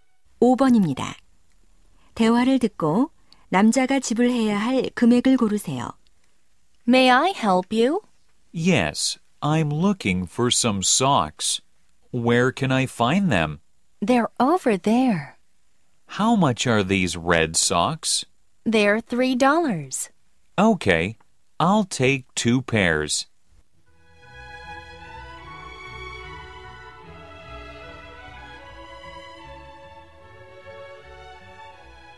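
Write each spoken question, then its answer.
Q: 대화를 듣고 남자가 지불해야 할 금액을 고르세요.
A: 6달러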